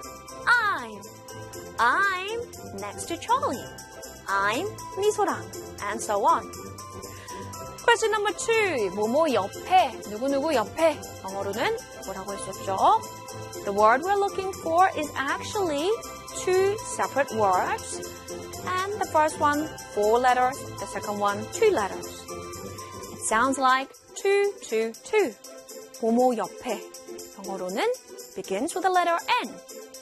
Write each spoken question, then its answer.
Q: 뭐뭐 옆에. 누구누구 옆에. 영어로는 뭐라고 할 수 있죠?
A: It is next to, next to.